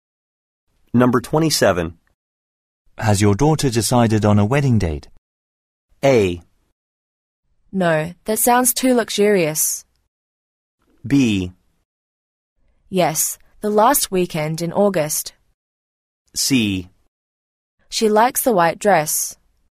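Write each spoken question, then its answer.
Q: Has your daughter decided on a wedding date?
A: B: Yes, the last weekend in August.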